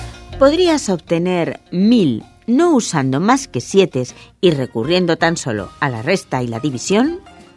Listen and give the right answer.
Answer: Sí, restando 777 a 7777 y dividiendo por 7 el resultado.